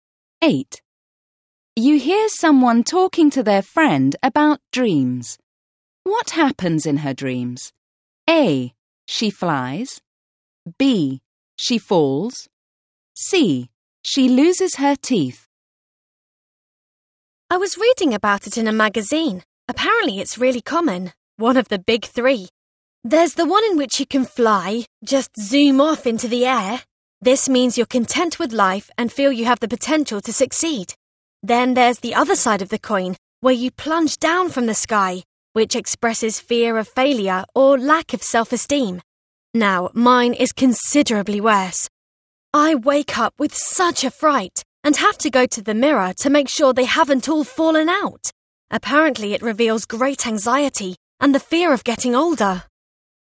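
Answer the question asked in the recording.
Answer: C: She loses her teeth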